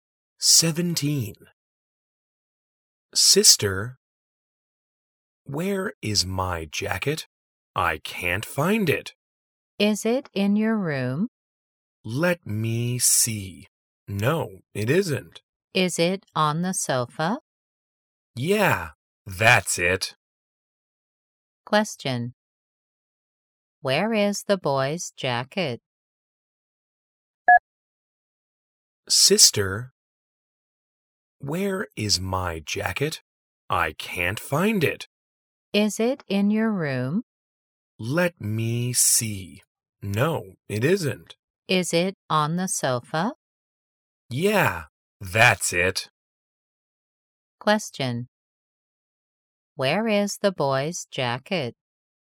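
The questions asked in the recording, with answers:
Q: Where is the boy's jacket?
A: On the sofa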